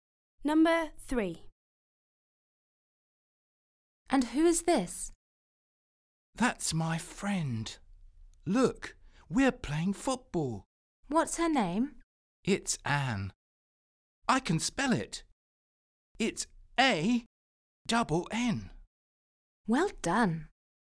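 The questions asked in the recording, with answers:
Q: What's her name?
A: Anne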